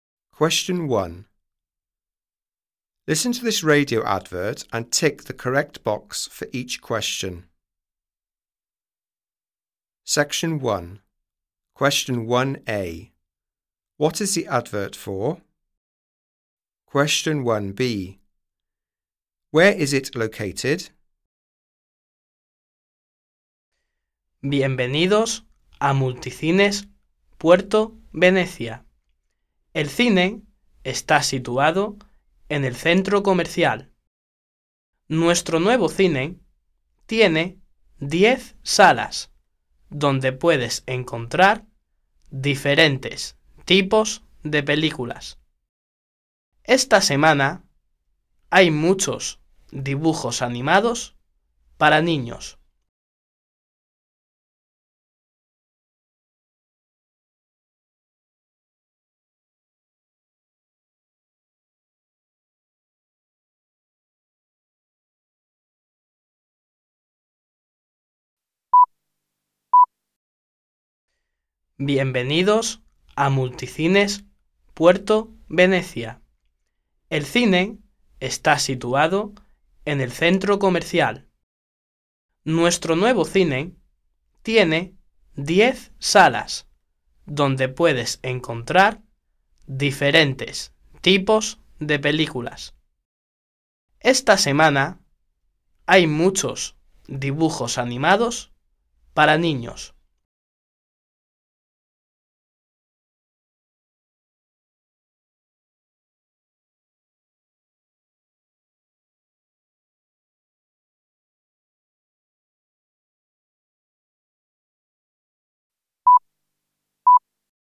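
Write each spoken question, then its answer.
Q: What is the advert for?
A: A cinema

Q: Where is it located?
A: In the shopping centre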